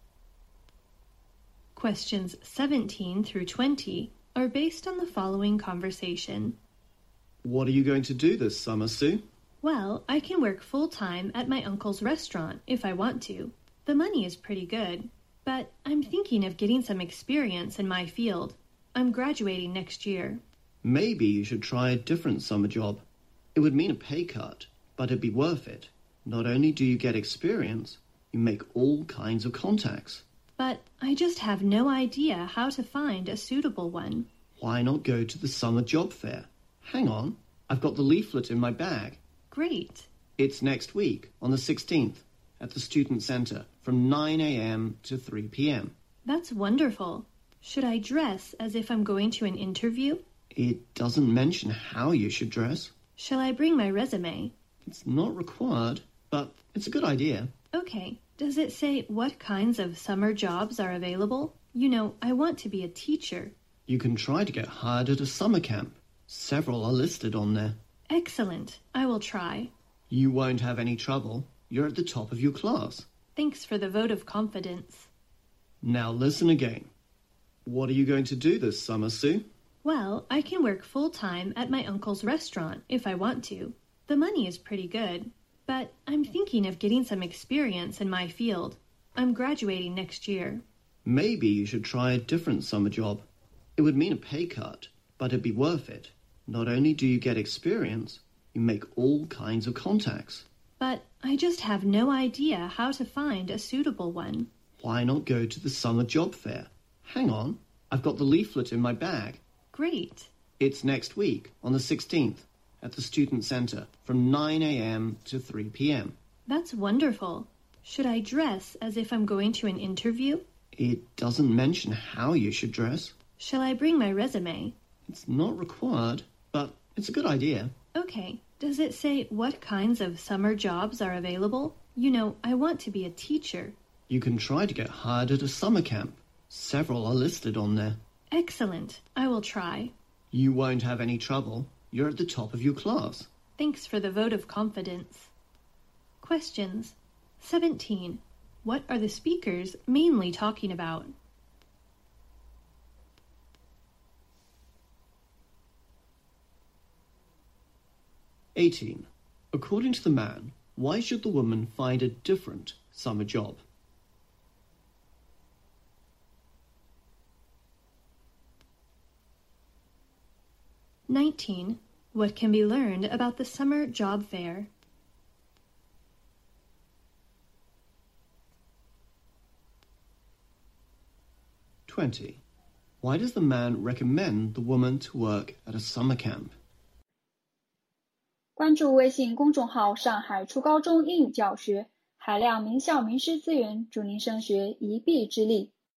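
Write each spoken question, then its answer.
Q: What are the speakers mainly talking about?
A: Finding a summer job

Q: According to the man, why should the woman find a different summer job?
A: To get experience and make contacts

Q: What can be learned about the summer job fair?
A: It is on the 16th at the Student Center, from 9 a.m. to 3 p.m.

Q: Why does the man recommend the woman to work at a summer camp?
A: She wants to be a teacher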